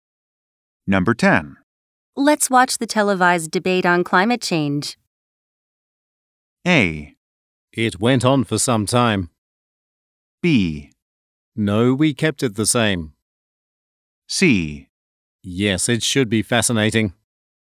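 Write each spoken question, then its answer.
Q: Let's watch the televised debate on climate change.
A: C: Yes, it should be fascinating.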